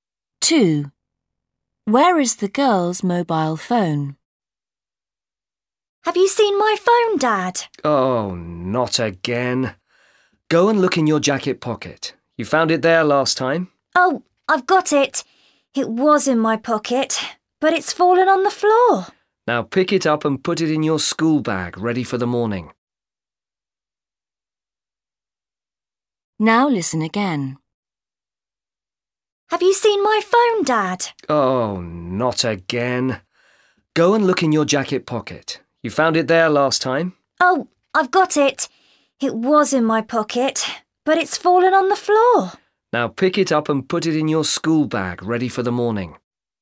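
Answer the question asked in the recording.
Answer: on the floor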